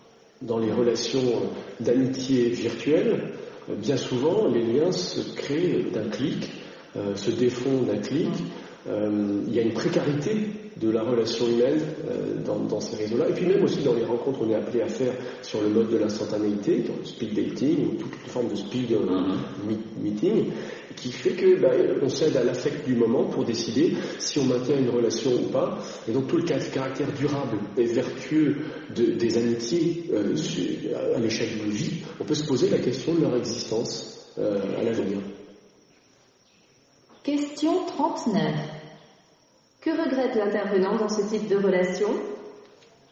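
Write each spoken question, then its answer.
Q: Que regrette l'intervenant dans ce type de relation ?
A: La précarité des relations : les liens se créent et se défont d'un clic, sans durabilité.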